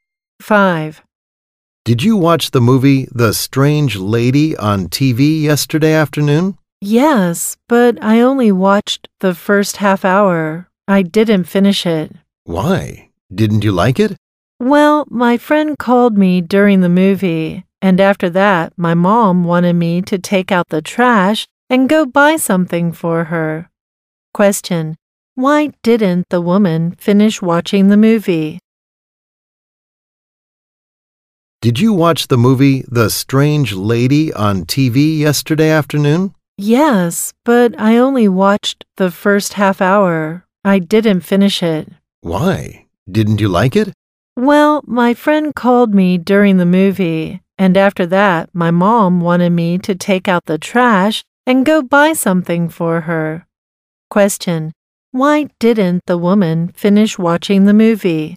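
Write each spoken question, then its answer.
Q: Why didn't the woman finish watching the movie?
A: Her friend called, and then her mom asked her to take out the trash and go shopping.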